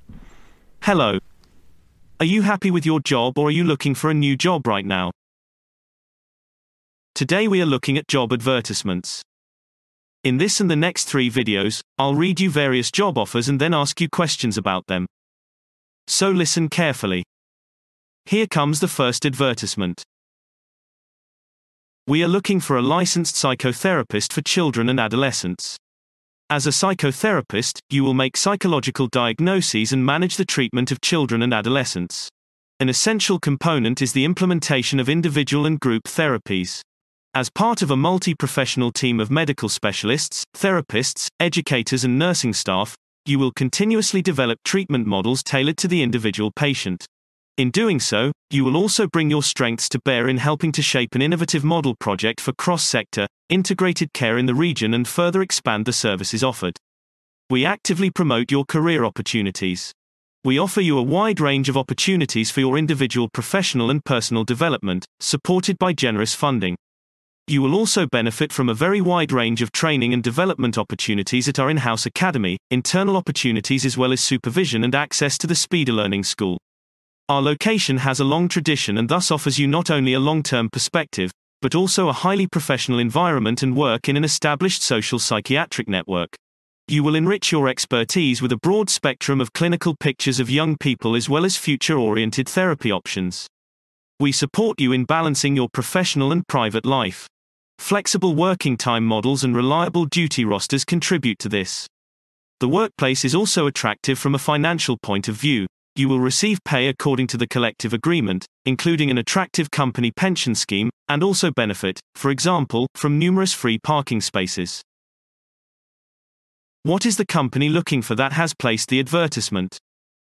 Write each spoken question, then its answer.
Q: What is the company looking for that has placed the advertisement?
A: They are looking for a licensed psychotherapist for children and adolescents.